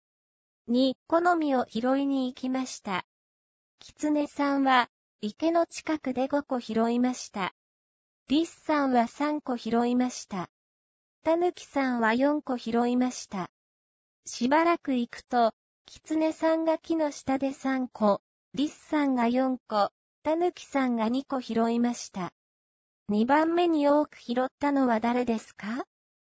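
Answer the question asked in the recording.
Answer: リスさん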